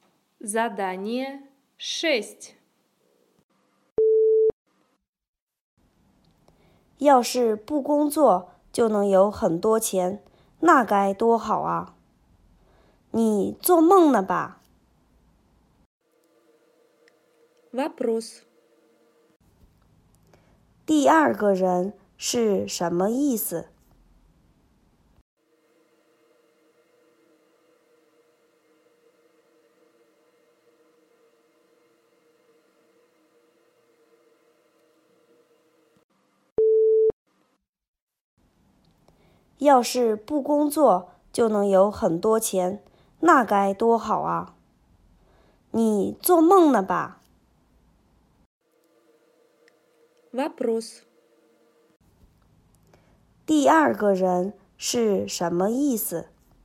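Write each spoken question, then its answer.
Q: 第二个人是什么意思?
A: 不工作就有很多钱是不可能的,是在做梦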